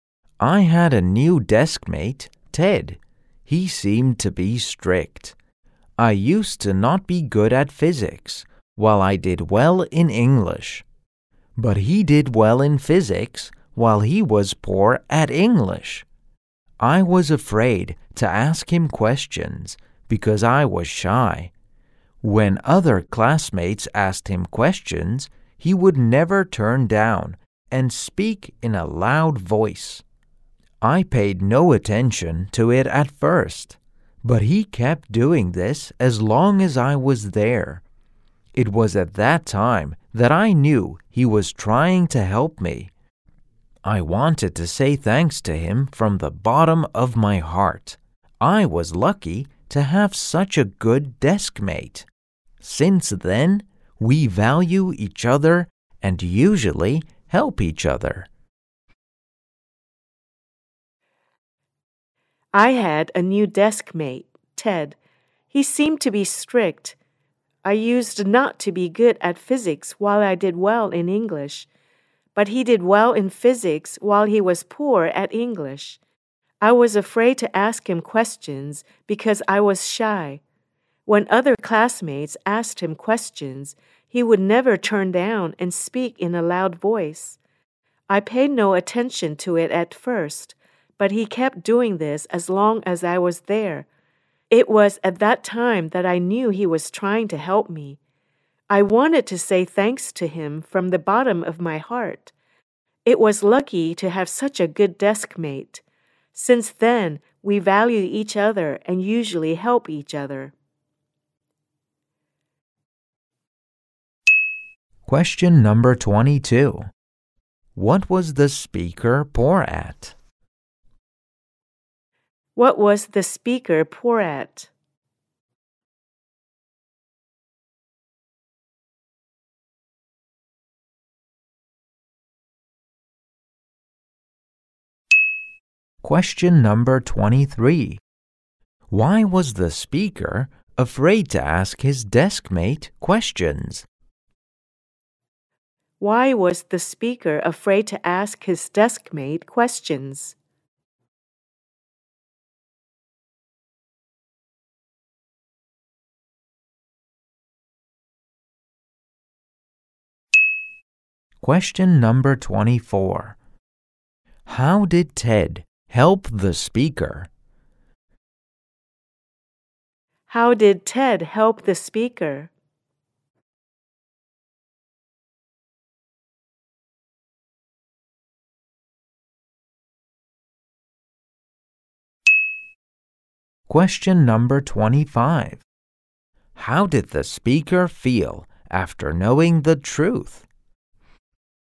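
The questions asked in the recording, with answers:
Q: What was the speaker poor at?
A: Physics

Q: Why was the speaker afraid to ask his deskmate questions?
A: Because he was shy

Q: How did Ted help the speaker?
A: He answered other classmates' questions in a loud voice so the speaker could hear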